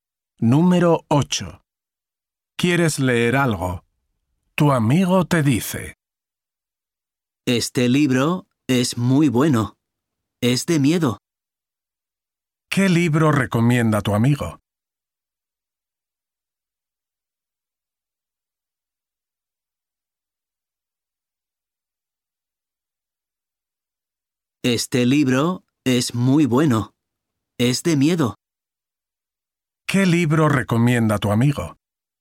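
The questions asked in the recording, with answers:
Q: ¿Qué libro recomienda tu amigo?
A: un libro de miedo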